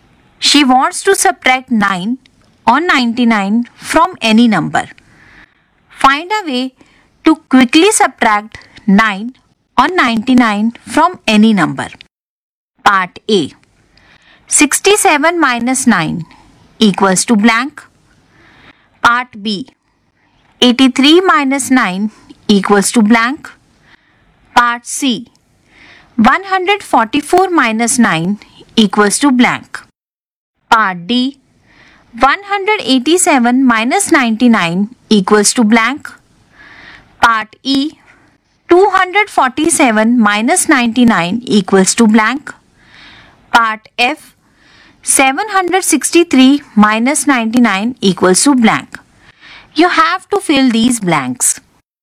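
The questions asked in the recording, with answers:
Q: Part A. 67 minus 9 equals to blank.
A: 58

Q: Part B. 83 minus 9 equals to blank.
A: 74

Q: Part C. 144 minus 9 equals to blank.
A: 135

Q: Part D. 187 minus 99 equals to blank.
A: 88

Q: Part E. 247 minus 99 equals to blank.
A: 148

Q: Part F. 763 minus 99 equals to blank.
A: 664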